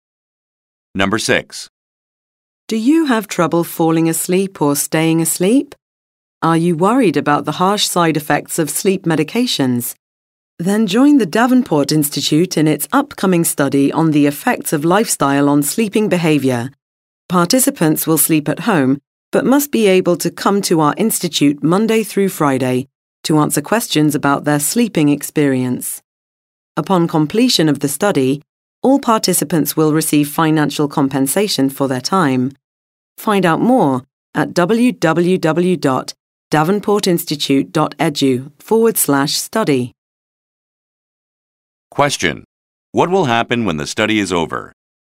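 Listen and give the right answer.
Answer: Participants will receive financial compensation for their time.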